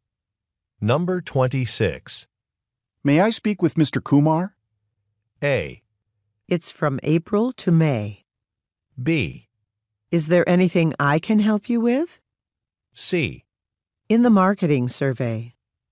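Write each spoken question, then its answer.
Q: May I speak with Mr. Kumar?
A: B: Is there anything I can help you with?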